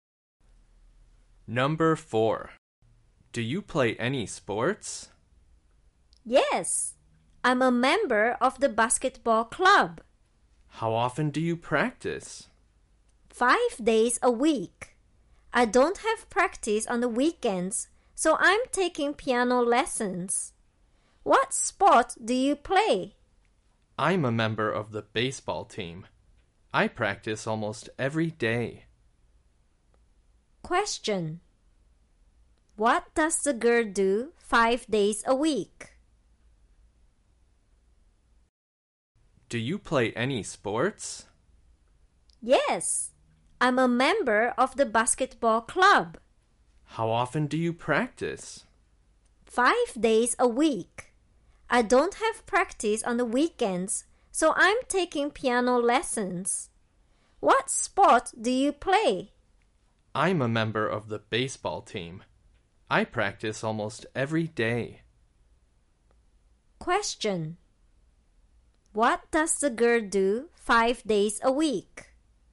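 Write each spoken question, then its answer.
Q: What does the girl do 5 days a week?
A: She practices basketball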